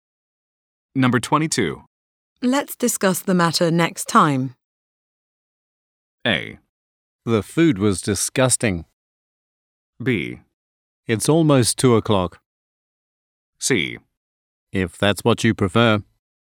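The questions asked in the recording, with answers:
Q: Let's discuss the matter next time.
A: C: If that's what you prefer.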